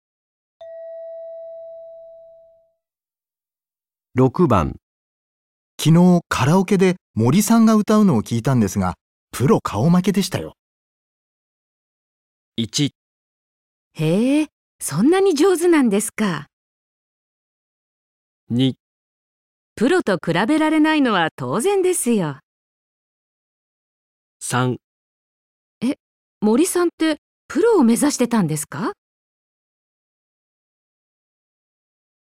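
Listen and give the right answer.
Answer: へぇー、そんなに上手なんですか?

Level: N1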